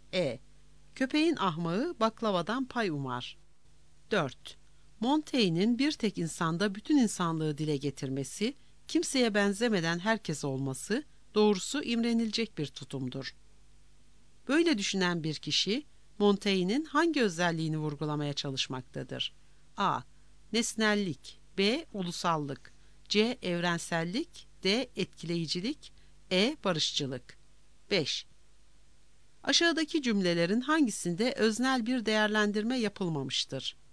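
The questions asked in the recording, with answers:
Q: Böyle düşünen bir kişi, Montaigne'in hangi özelliğini vurgulamaya çalışmaktadır?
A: C: Evrensellik.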